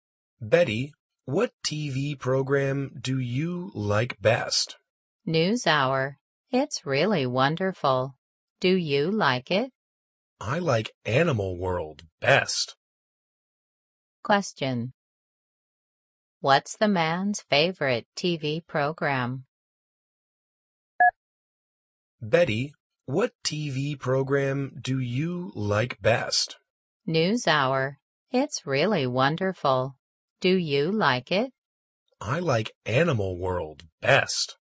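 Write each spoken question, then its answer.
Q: What's the man's favorite TV program?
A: Animal World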